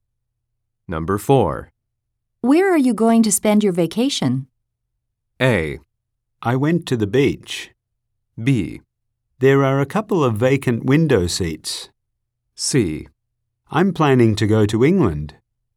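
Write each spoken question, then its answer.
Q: Where are you going to spend your vacation?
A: C: I'm planning to go to England.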